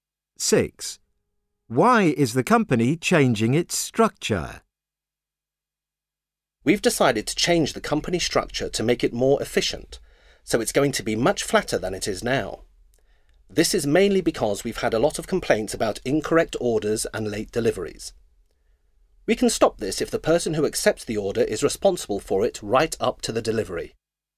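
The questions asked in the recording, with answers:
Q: Why is the company changing its structure?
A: Because of complaints about incorrect orders and late deliveries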